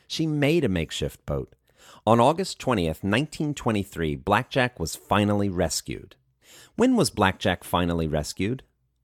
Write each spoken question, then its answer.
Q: When was Blackjack finally rescued?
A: Blackjack was finally rescued on August 20th, 1923.